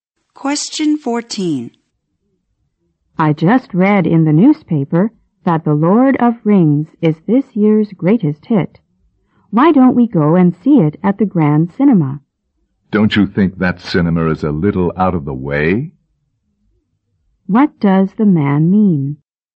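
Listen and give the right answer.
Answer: The cinema is too far away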